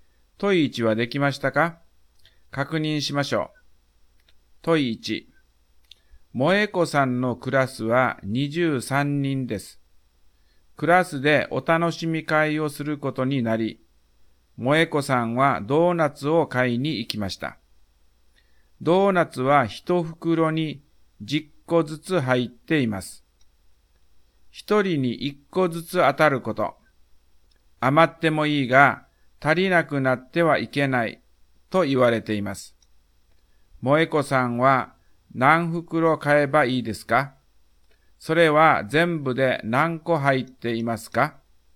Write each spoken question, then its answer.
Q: 萌子さんは何袋買えばいいですか?それは全部で何個入っていますか?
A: 答えは3袋30個です。